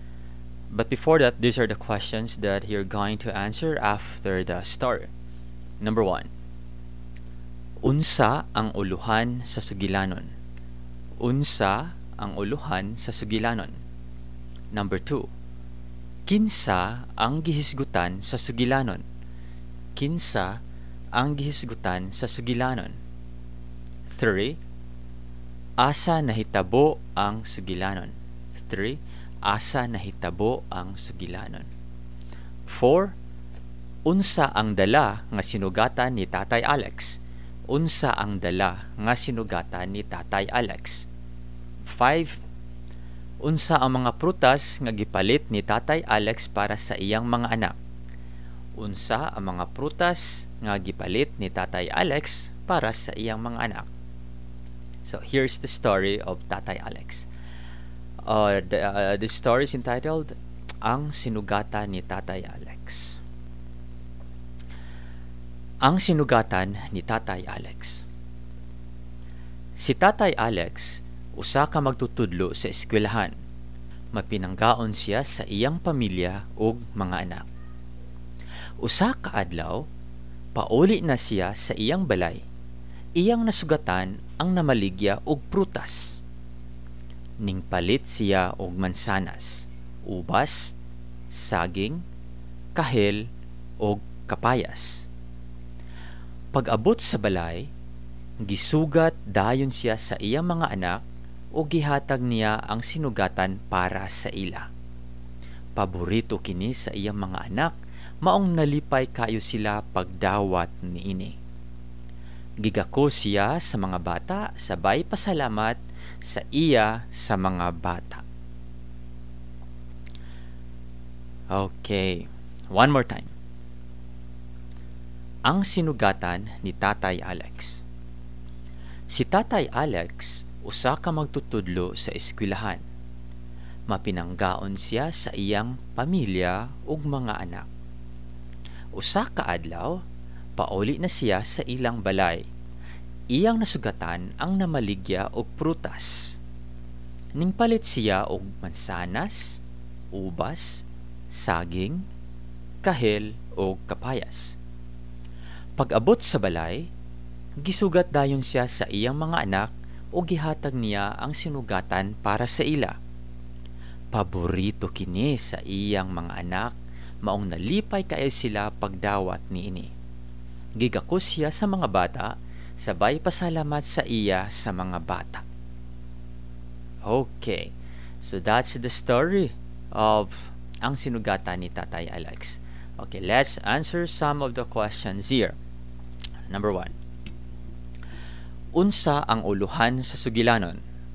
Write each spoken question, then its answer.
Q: Unsa ang uluhan sa sugilanon?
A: Correct, ang sinugatan ni Tatay Alex.

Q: Kinsa ang gihisgutan sa sugilanon?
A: Correct, si Tatay Alex.

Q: Unsa ang dala nga sinugatan ni Tatay Alex?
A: Correct. Mga prutas. Fruits.

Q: Unsa ang mga prutas nga gipalit ni Tatay Alex para sa iyang mga anak?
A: Mao ang mansanas, ubas, saging, kahel o kapayas.